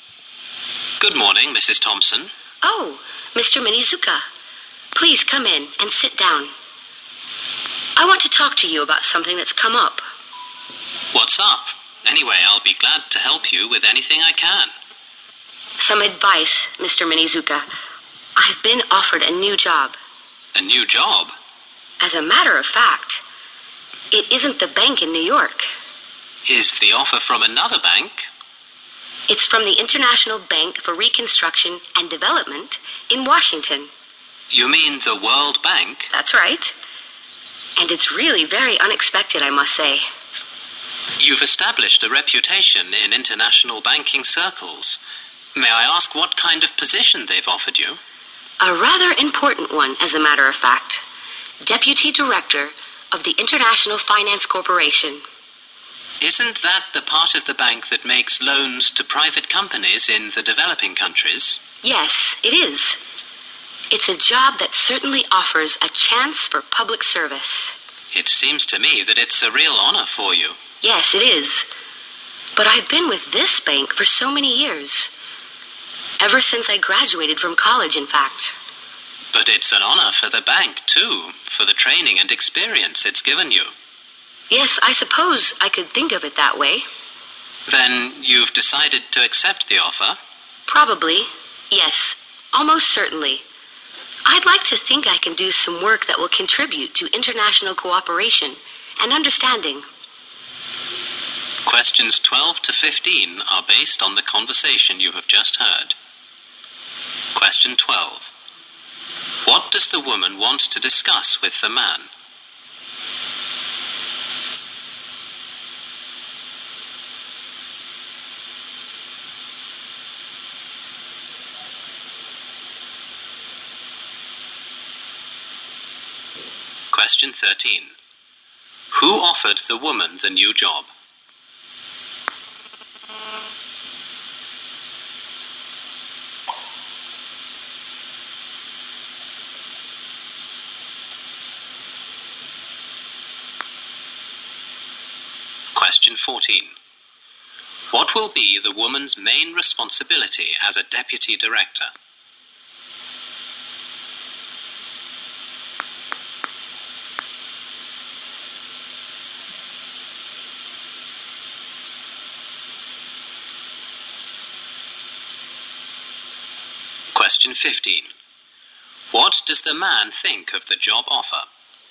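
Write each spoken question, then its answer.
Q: What does the woman want to discuss with the man?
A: Whether to accept a new job offer.

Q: Who offered the woman the new job?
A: The World Bank.

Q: What does the man think of the job offer?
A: It is a real honor for her.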